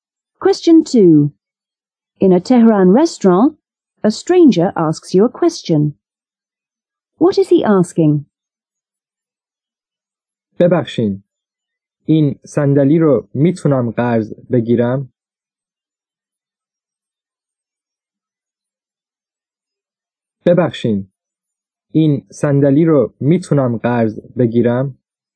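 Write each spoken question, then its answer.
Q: What is he asking?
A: Whether he can borrow this chair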